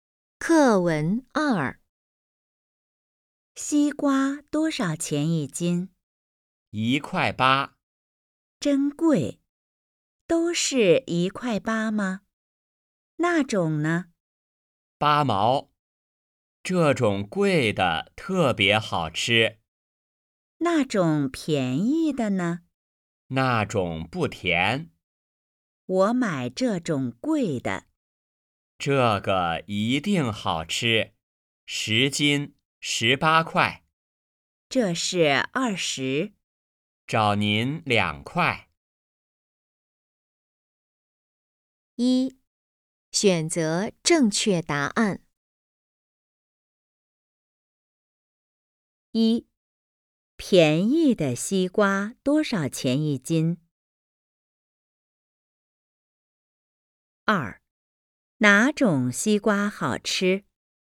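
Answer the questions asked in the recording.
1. 8毛
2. 贵的那种(1.8块一斤)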